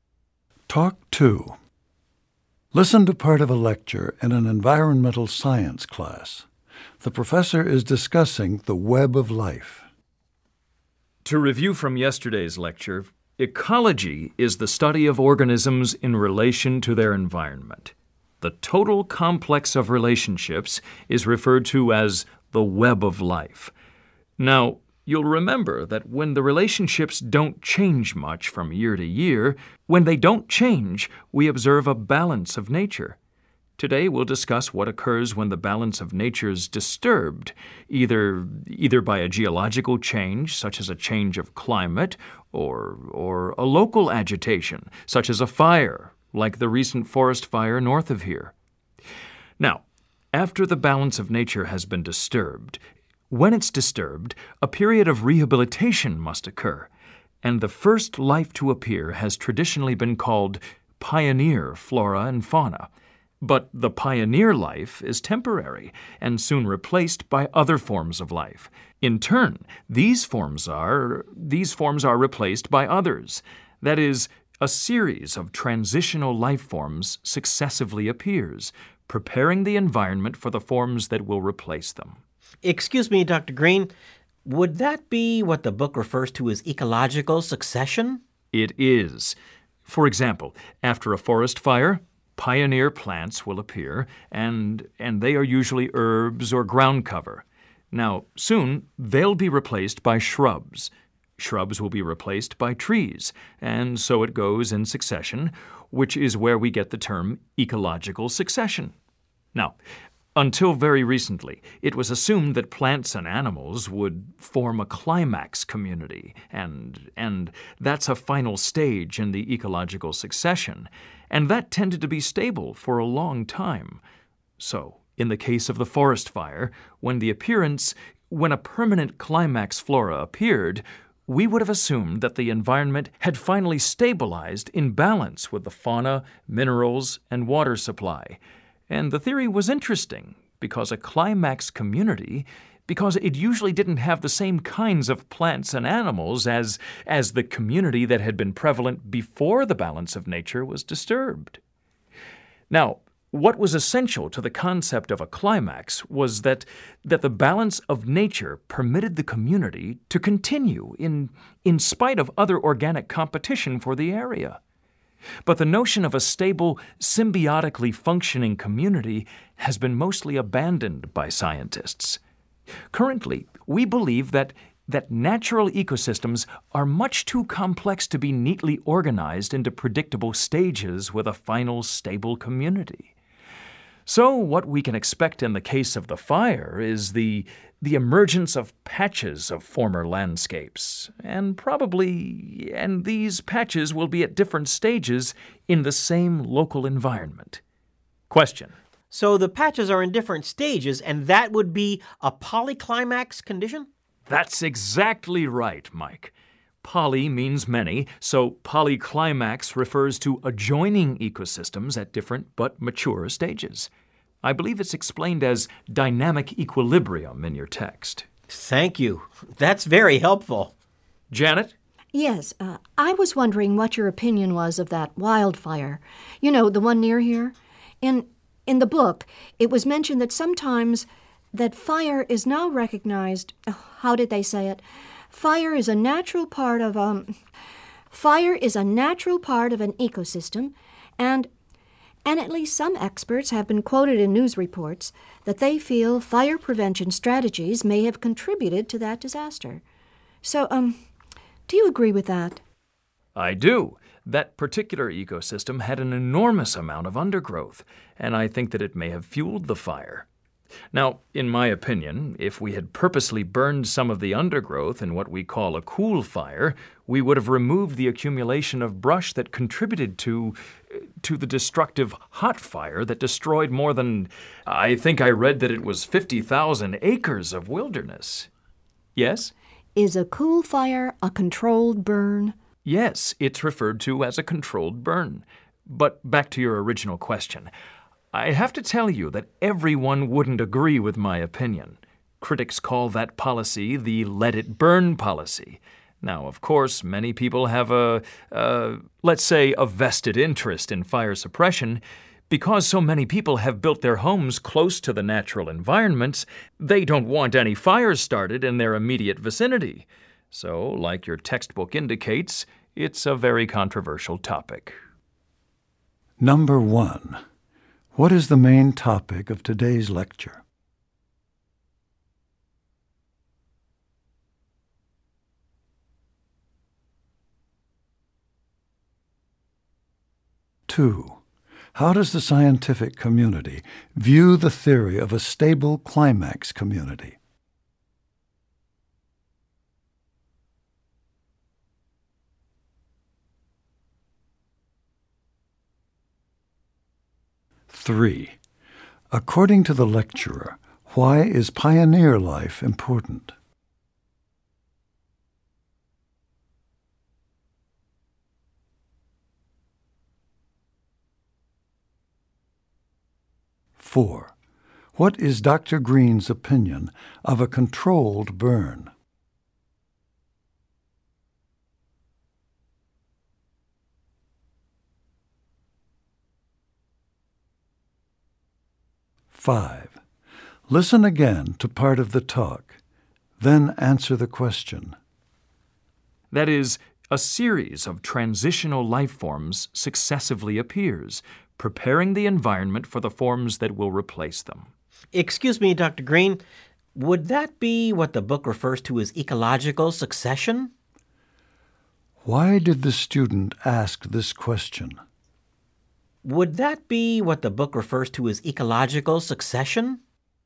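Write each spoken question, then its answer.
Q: how does the scientific community view the theory of a stable climax community?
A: It has mostly been abandoned

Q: according to the lecturer, why is pioneer life important?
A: It prepares the environment for the life forms that replace it

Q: what is Dr. Green's opinion of a controlled burn?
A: He supports it; it would have removed the undergrowth that fueled the destructive fire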